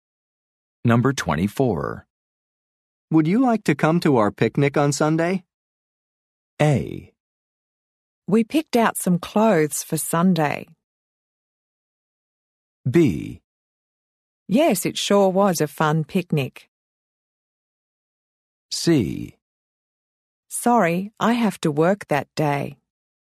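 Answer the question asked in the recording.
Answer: C: Sorry, I have to work that day.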